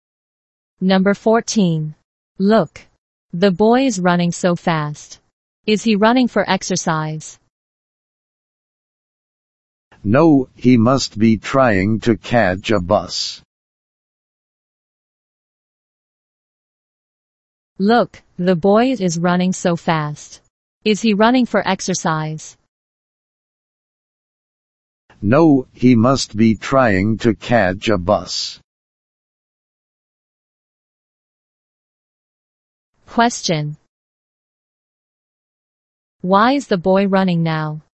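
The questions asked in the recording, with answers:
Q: Why is the boy running now?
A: To catch a bus.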